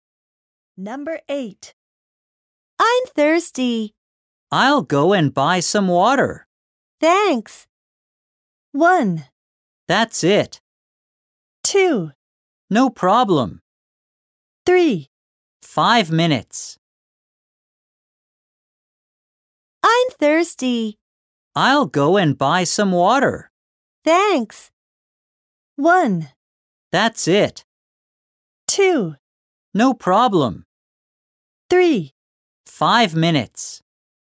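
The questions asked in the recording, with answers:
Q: Thanks.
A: 2: No problem.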